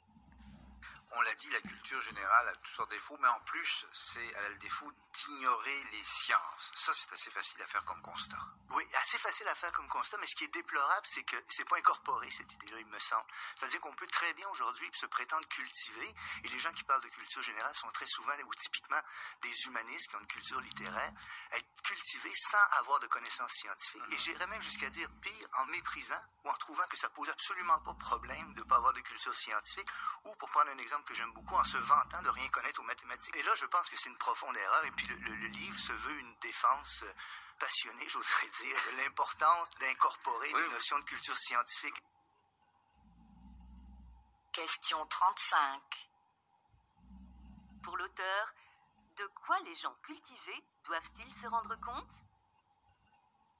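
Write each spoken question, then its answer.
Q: Pour l'auteur, de quoi les gens cultivés doivent-ils se rendre compte?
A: Que la culture générale doit inclure des connaissances scientifiques; ignorer les sciences est une profonde erreur.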